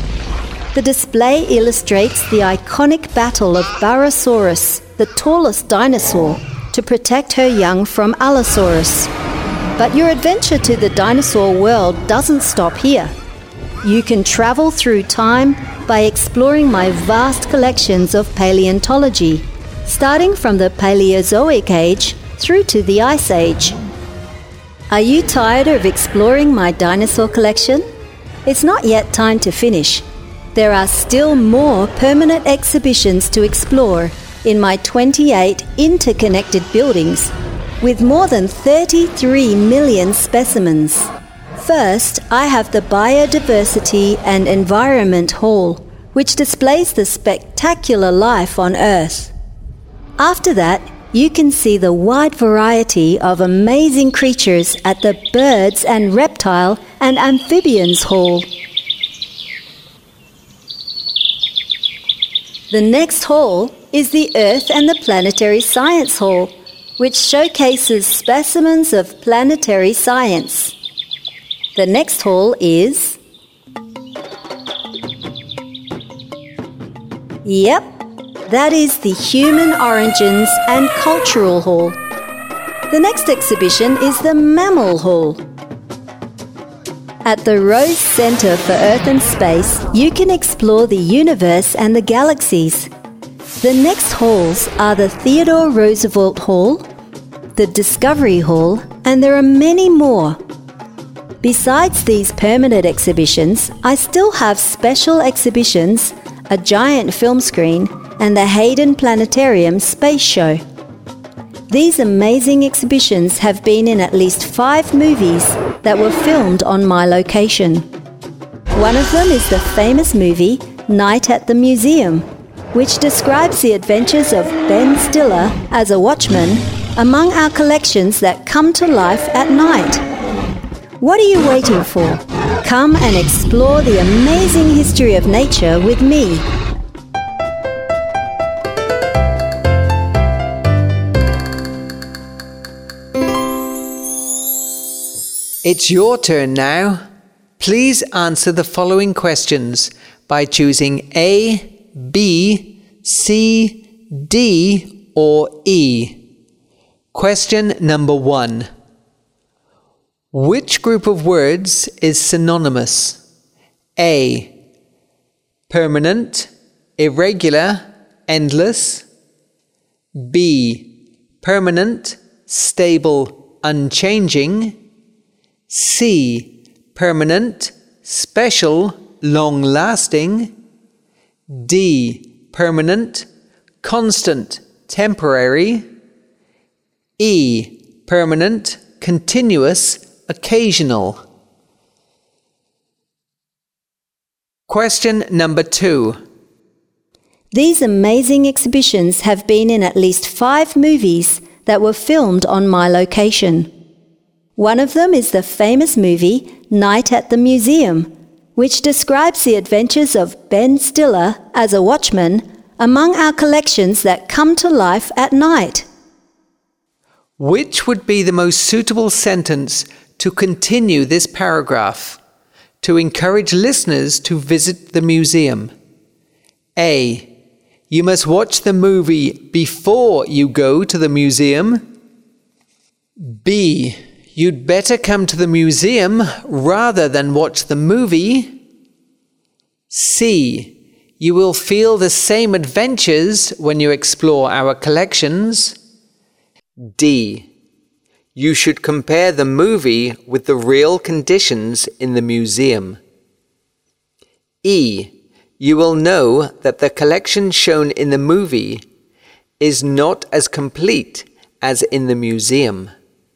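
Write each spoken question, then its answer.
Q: Which group of words is synonymous?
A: B: Permanent, stable, unchanging.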